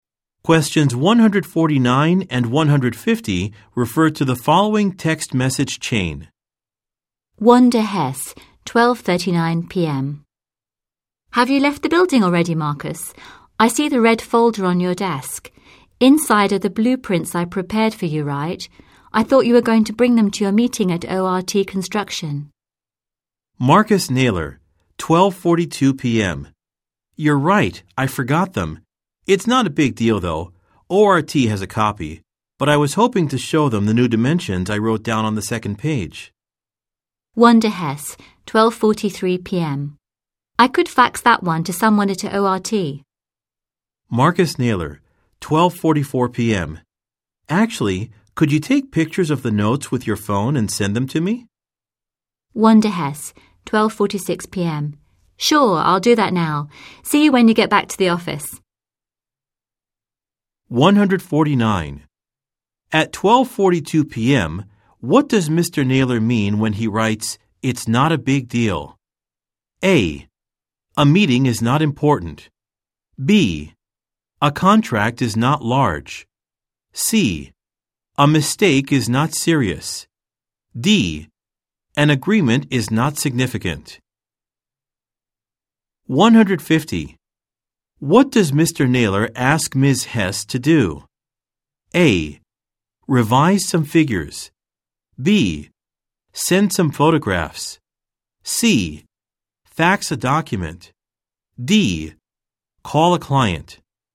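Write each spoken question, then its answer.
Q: At 12:42 p.m., what does Mr. Naylor mean when he writes, "It's not a big deal"?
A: C: A mistake is not serious.

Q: What does Mr. Naylor ask Ms. Hess to do?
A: B: Send some photographs.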